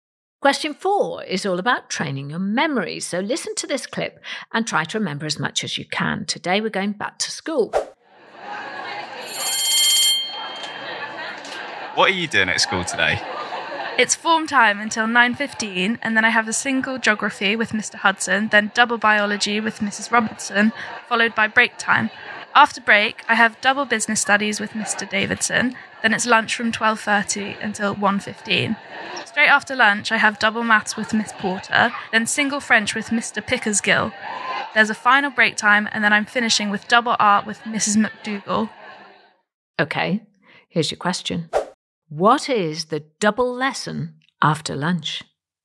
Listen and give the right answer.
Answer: The answer, maths.